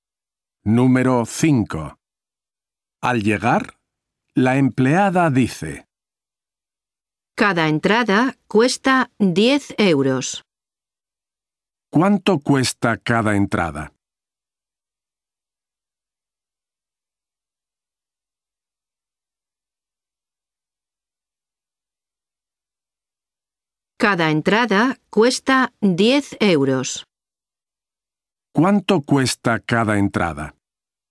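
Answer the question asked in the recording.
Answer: 10 euros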